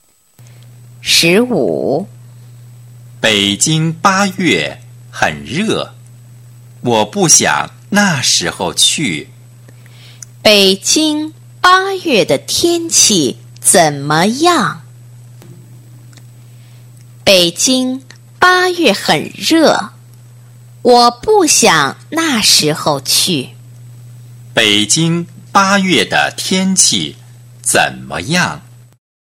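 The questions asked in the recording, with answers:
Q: 北京八月的天气怎么样?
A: 很热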